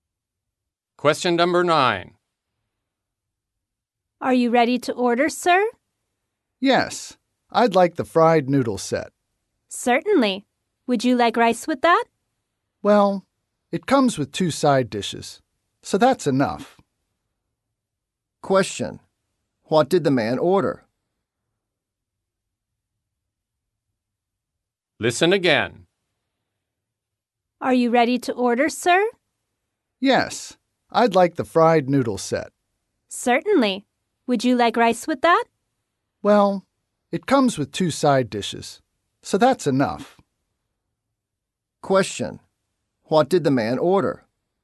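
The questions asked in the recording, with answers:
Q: What did the man order?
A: The fried noodle set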